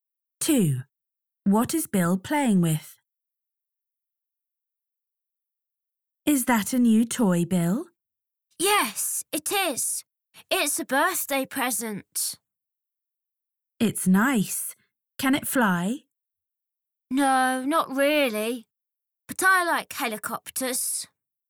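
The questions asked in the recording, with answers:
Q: What is Bill playing with?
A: a helicopter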